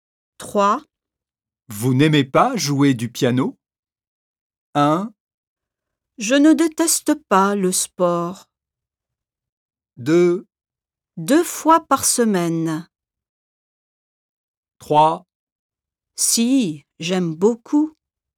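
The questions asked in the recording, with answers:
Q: Vous n'aimez pas jouer du piano?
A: 3: Si, j'aime beaucoup.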